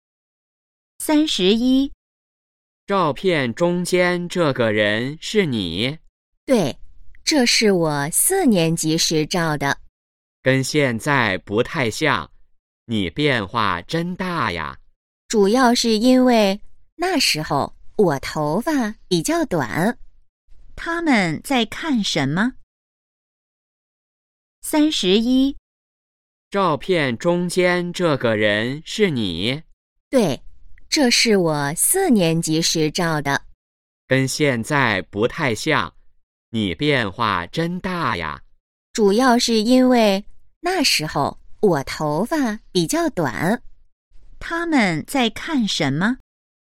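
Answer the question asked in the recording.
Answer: 照片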